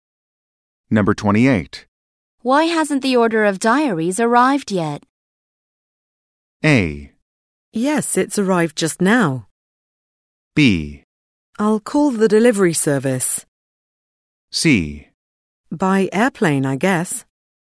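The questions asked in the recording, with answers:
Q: Why hasn't the order of diaries arrived yet?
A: B: I'll call the delivery service.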